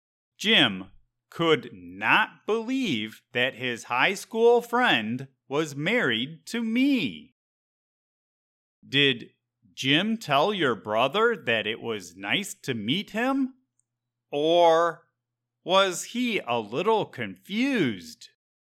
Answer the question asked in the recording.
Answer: Jim was a little confused.